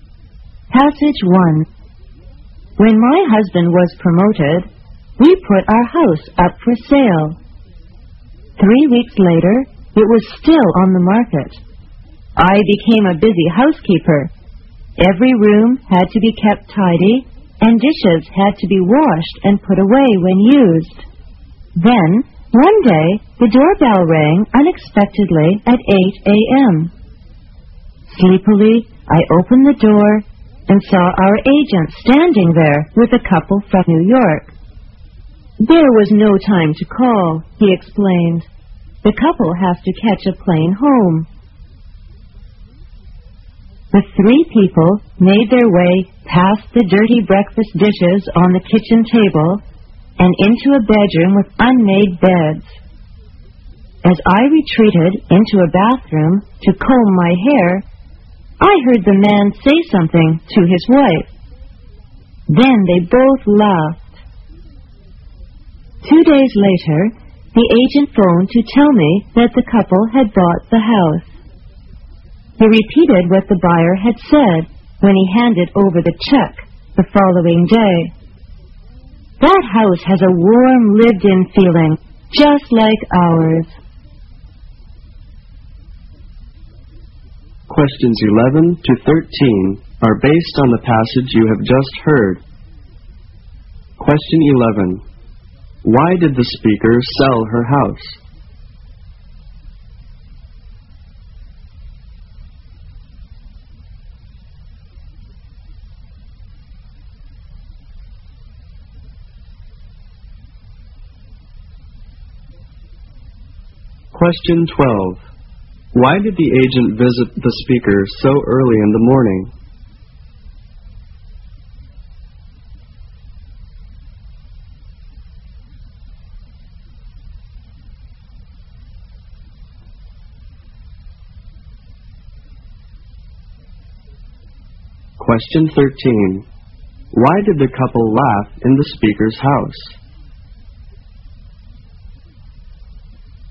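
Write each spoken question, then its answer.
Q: Why did the speaker sell her house?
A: Because her husband was promoted.

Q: Why did the agent visit the speaker so early in the morning?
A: The couple had to catch a plane home, so there was no time to call first.

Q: Why did the couple laugh in the speaker's house?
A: The messy house felt warm and lived-in, just like their own.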